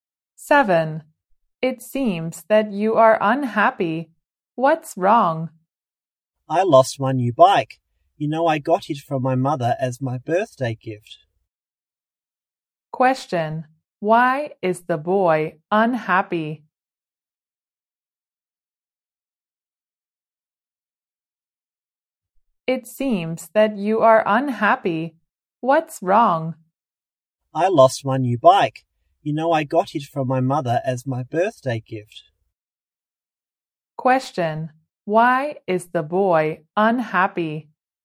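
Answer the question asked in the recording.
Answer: He lost his new bike.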